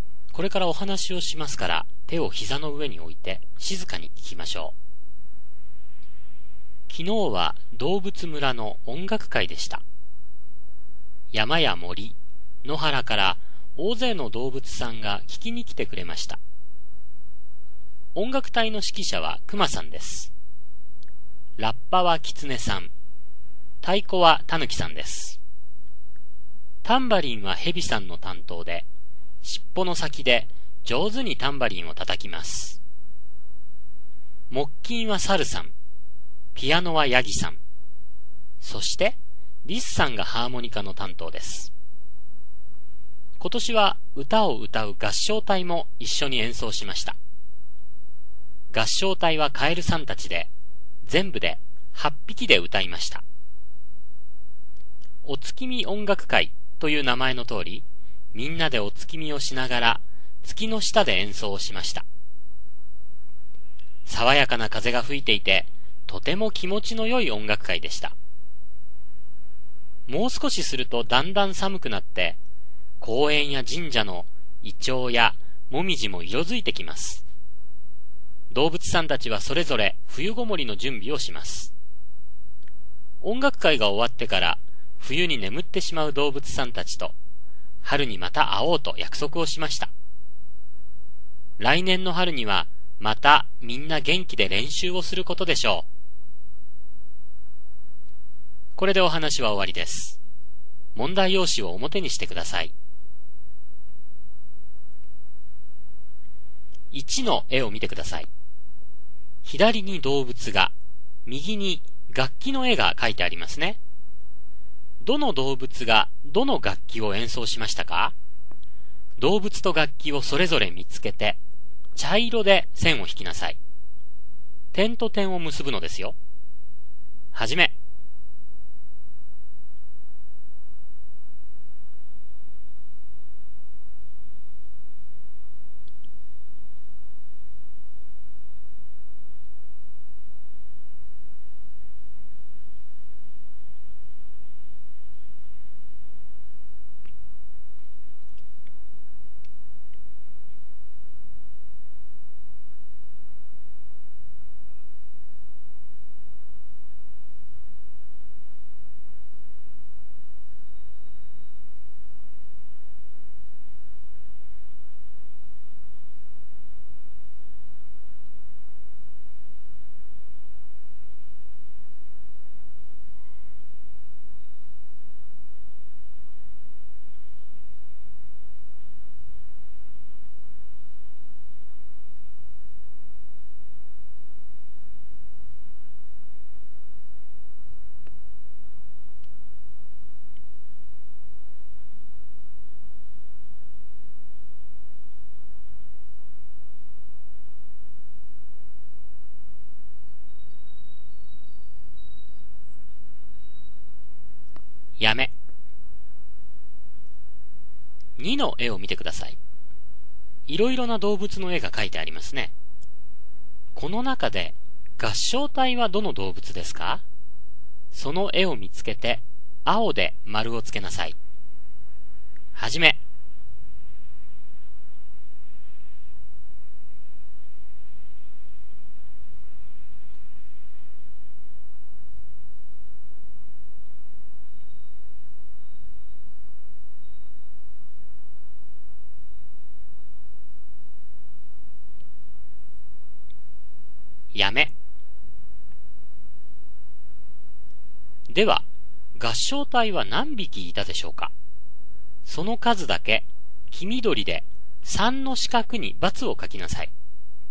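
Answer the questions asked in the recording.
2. カエル
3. 8匹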